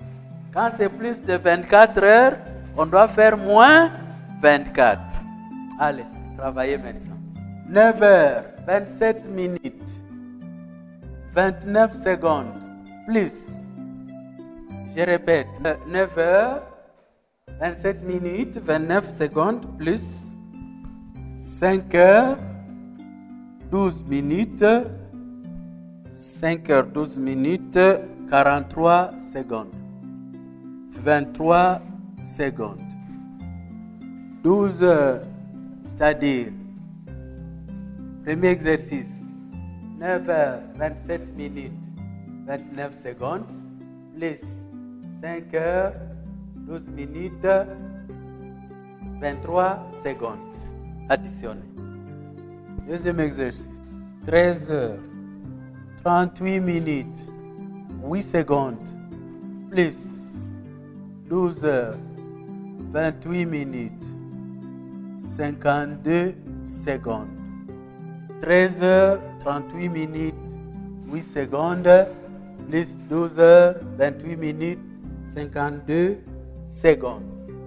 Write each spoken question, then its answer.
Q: 9 heures, 27 minutes, 29 secondes, plus 5 heures, 12 minutes, 23 secondes, additionné.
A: 14h39min52s.

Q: 13 heures, 38 minutes, 8 secondes, plus 12 heures, 28 minutes, 52 secondes.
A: Il y a un jour, 2 heures, 7 minutes et 0 secondes.